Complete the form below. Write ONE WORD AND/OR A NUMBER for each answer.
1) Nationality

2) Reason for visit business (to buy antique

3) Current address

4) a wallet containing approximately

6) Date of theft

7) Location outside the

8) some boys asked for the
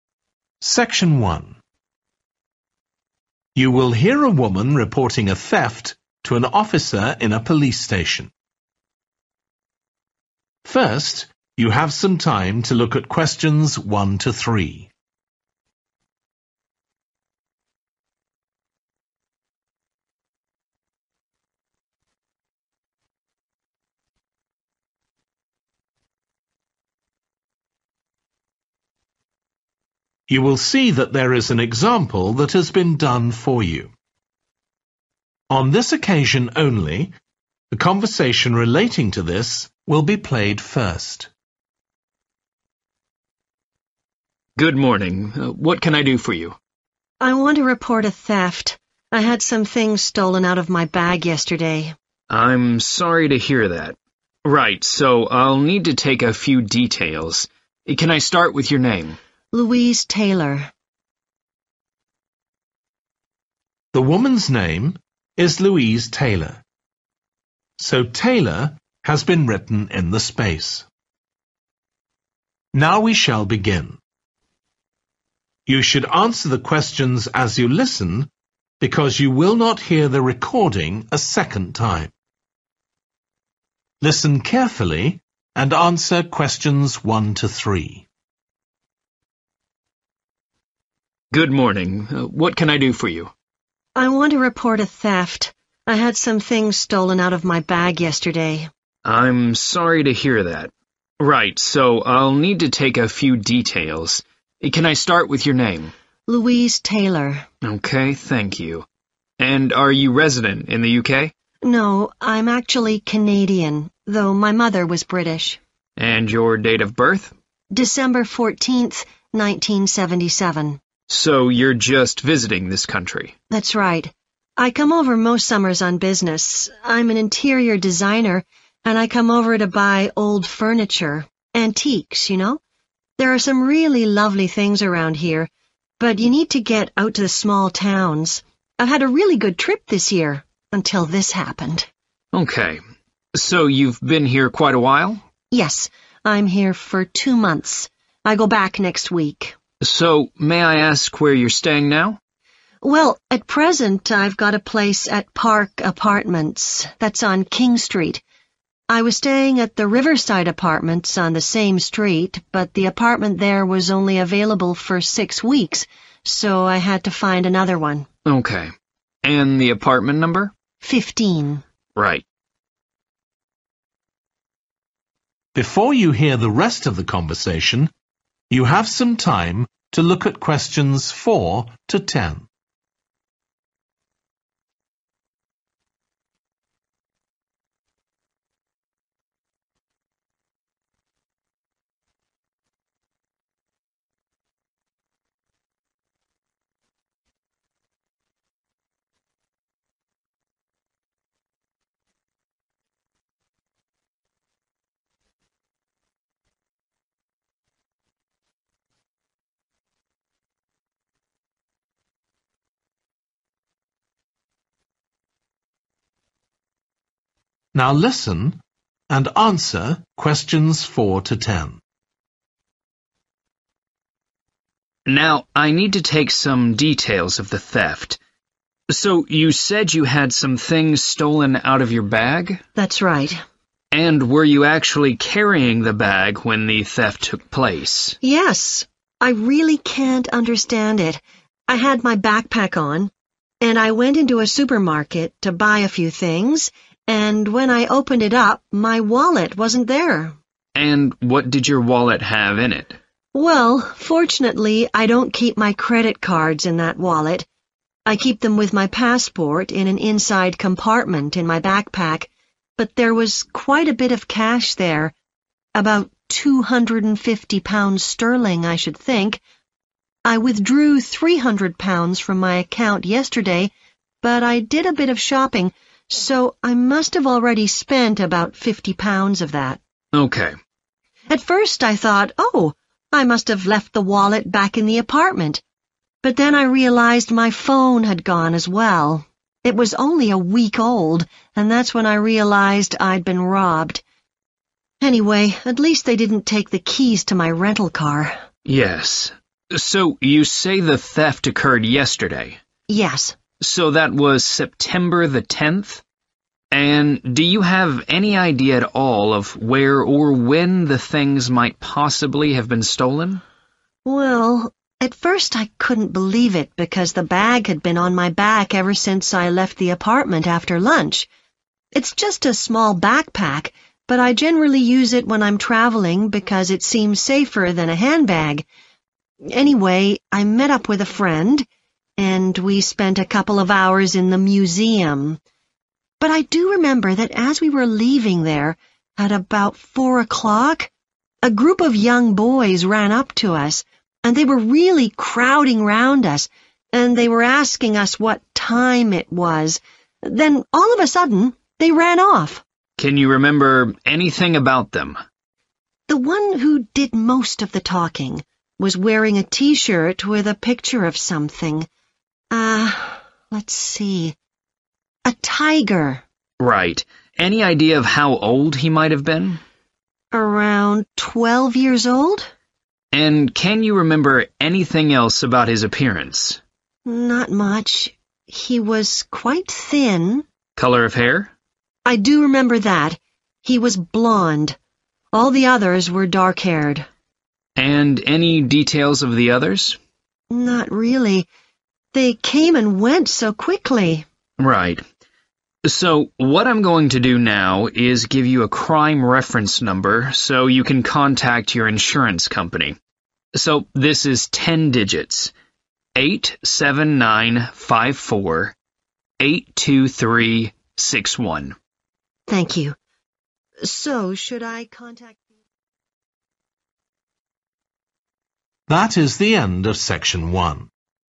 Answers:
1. Canadian
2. furniture
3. Park
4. 250
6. 10 September
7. museum
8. time

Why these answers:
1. No, I'm actually (Q1) Canadian (Không, thực ra tôi là người Canada).
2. (Q2) I come over most summers on business. I'm an interior designer and I come over to buy old (=antique) furniture, antiques you know. (Tôi đi công tác vào hầu hết các mùa hè. Tôi là một nhà thiết kế nội thất và tôi đến để mua đồ nội thất cũ, đồ cổ – bạn biết đó)
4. (Q4) But there was quite a bit of cash there ... about £250 sterling, I should think. (Nhưng có một ít tiền ở đó... khoảng 250 euro).